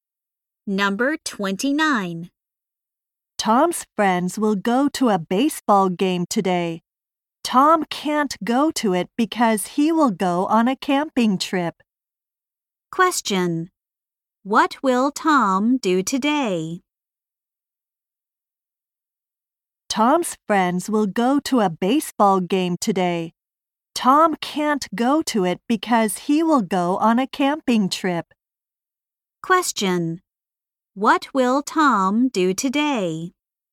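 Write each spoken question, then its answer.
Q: What will Tom do today?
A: Go on a camping trip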